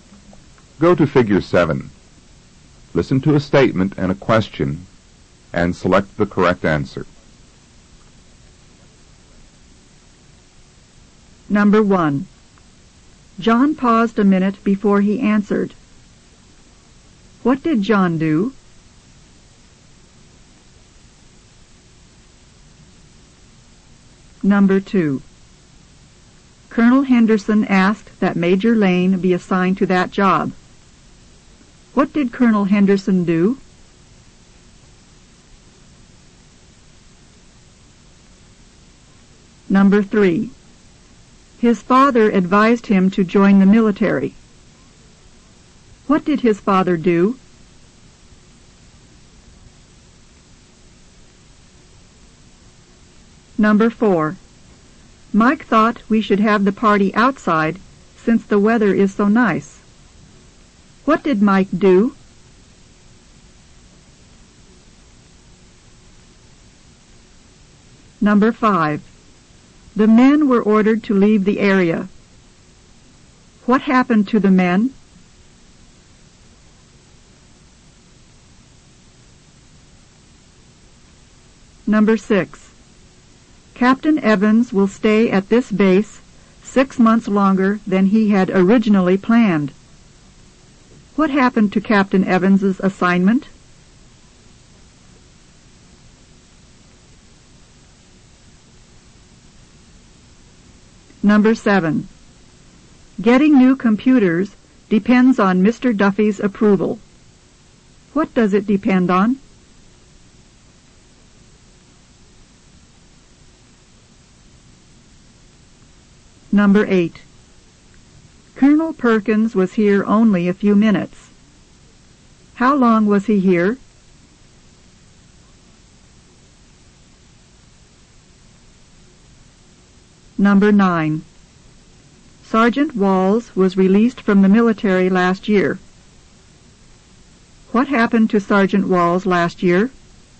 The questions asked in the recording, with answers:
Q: What did John do?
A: John hesitated.

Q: What did Colonel Henderson do?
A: He requested that he be assigned that job.

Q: What did his father do?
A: He urged him to join the military.

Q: What did Mike do?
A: He suggested it.

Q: What happened to the men?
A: They were commanded to leave.

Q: What happened to Captain Evans's assignment?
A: It was extended.

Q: Duffy's approval. What does it depend on?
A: It's subject to Mr.

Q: How long was he here?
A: A brief time.

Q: What happened to Sergeant Walls last year?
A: He was discharged.